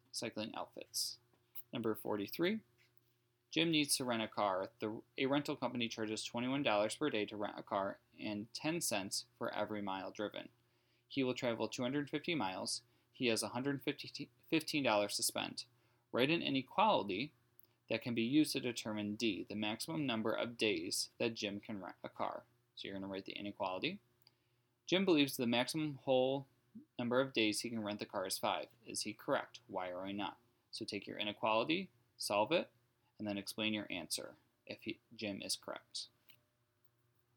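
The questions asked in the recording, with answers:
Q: Write an inequality that can be used to determine D, the maximum number of days that Jim can rent a car.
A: 21D + 25 ≤ 115

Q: Is he correct? Why or why not?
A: No; D ≤ about 4.29, so the maximum is 4 days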